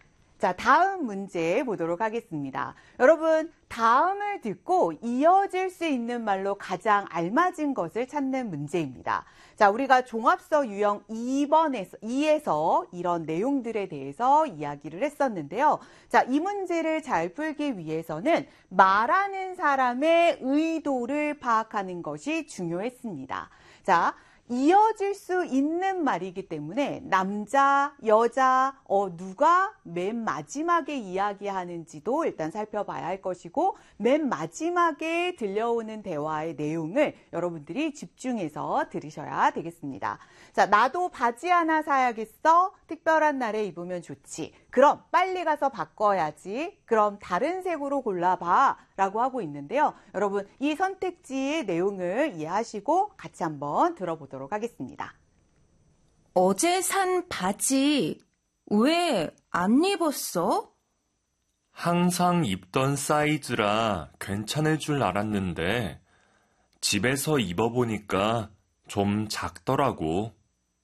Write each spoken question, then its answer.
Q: 다음을 듣고 이어질 수 있는 말로 가장 알맞은 것을 찾는 문제입니다.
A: 그래서 정답은 3번이 되겠습니다.